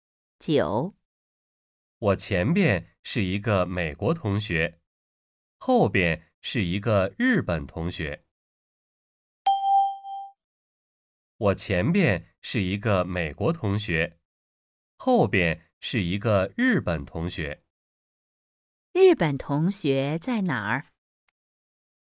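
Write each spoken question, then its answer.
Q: 日本同学在哪儿?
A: 在我后边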